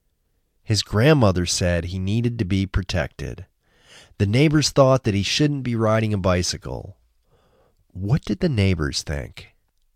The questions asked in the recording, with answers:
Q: What did the neighbors think?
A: The neighbors thought he shouldn't be riding a bicycle.